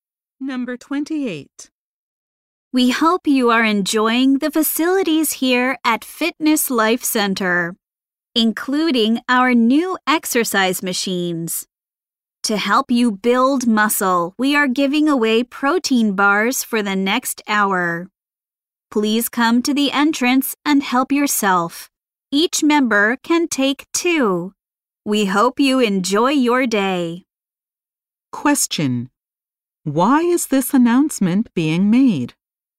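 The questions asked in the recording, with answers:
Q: Why is this announcement being made?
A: Free protein bars are being given away.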